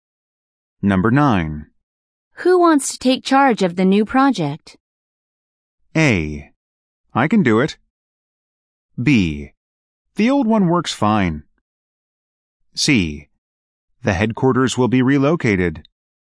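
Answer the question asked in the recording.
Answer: A: I can do it.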